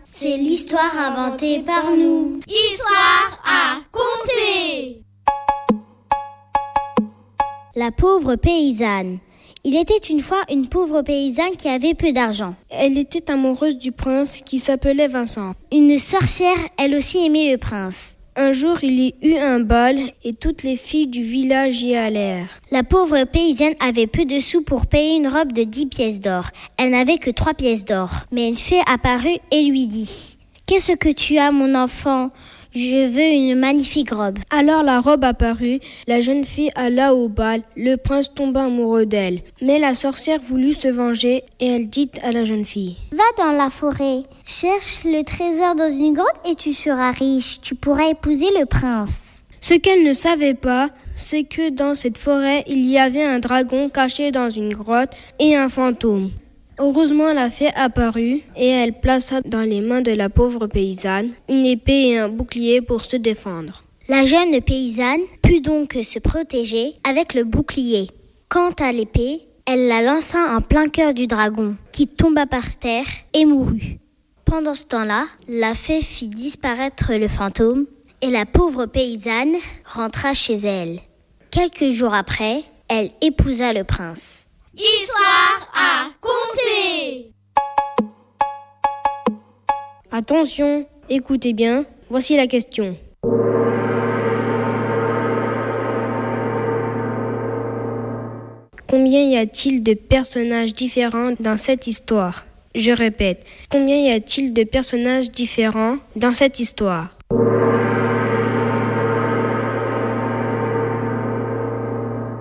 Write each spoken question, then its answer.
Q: Combien y a-t-il de personnages différents dans cette histoire ?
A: 6 personnages différents.